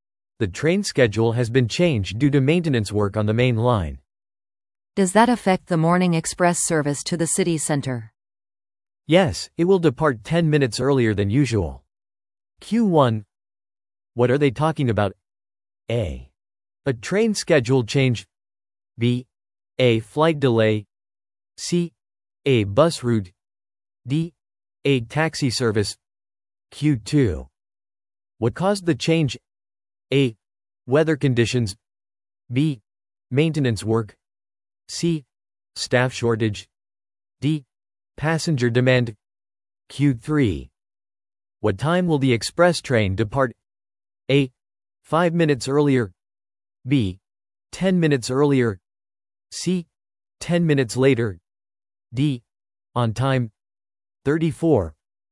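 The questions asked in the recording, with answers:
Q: What are they talking about?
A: A: A train schedule change.

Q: What caused the change?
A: B: Maintenance work.

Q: What time will the express train depart?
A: B: 10 minutes earlier.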